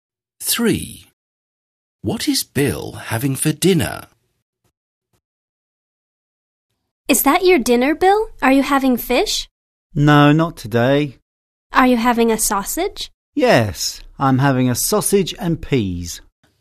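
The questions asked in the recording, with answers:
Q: What is Bill having for dinner?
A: A sausage and peas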